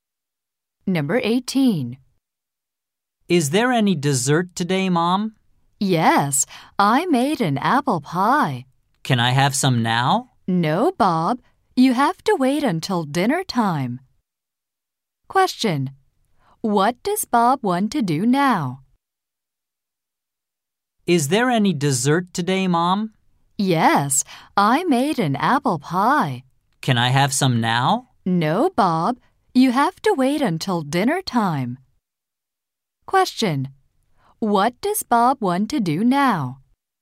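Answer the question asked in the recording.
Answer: Eat some apple pie.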